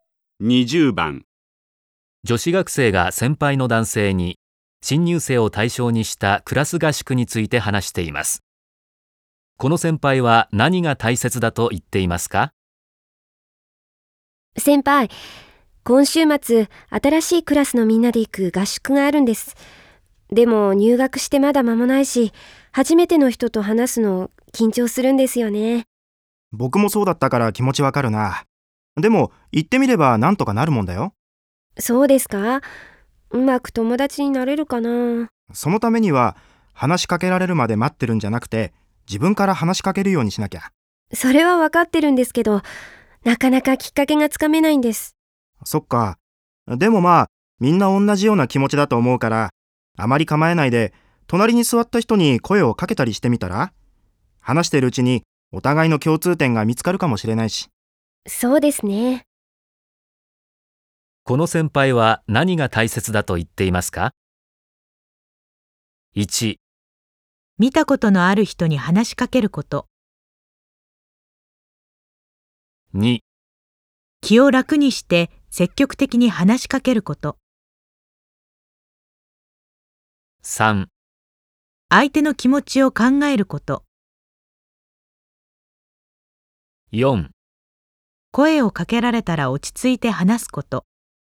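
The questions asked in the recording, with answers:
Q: この先輩は何が大切だと言っていますか?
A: 2: 気を楽にして積極的に話しかけること。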